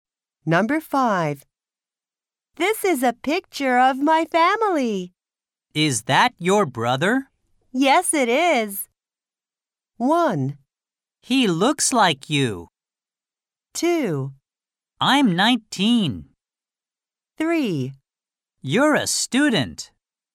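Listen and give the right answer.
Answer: 1: He looks like you.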